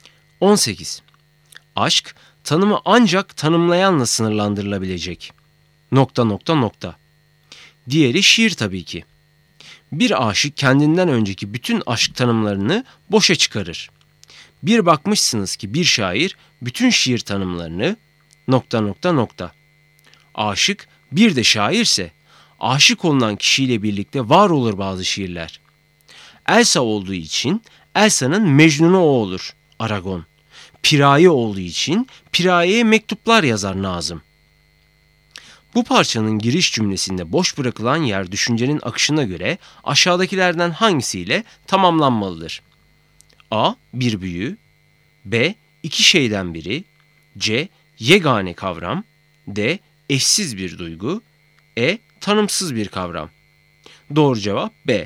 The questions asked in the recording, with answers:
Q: Bu parçanın giriş cümlesinde boş bırakılan yer düşüncenin akışına göre aşağıdakilerden hangisiyle tamamlanmalıdır?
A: Doğru cevap B.